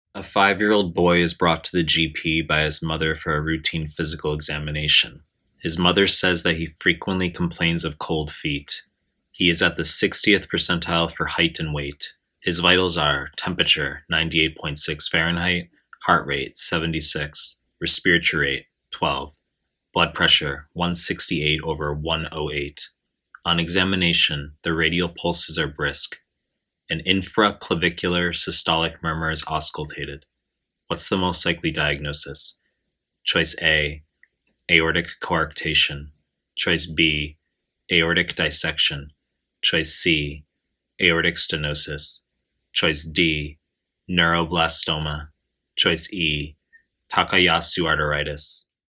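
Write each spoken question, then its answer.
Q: What's the most likely diagnosis?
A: A: aortic coarctation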